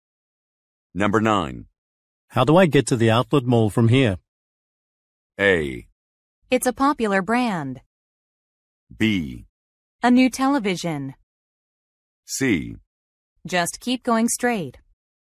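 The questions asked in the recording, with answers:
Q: How do I get to the outlet mall from here?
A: C: Just keep going straight.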